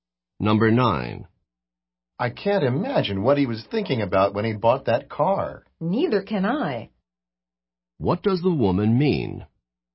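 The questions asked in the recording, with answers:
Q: What does the woman mean?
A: She also cannot understand why he bought that car.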